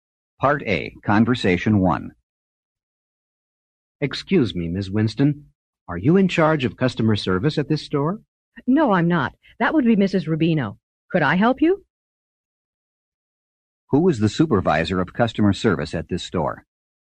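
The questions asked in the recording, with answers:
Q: Who is the supervisor of customer service at this store?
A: Mrs. Rubino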